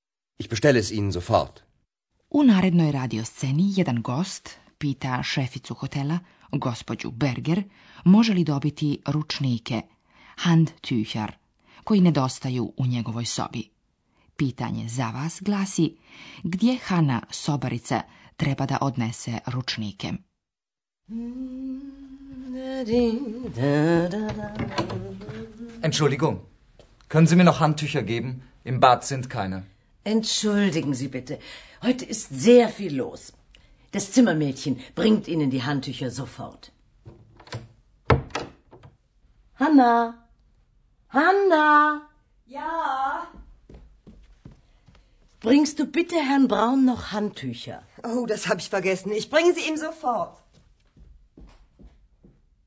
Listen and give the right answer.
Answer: Hanna treba da odnese peškire u sobu gospodina Brauna.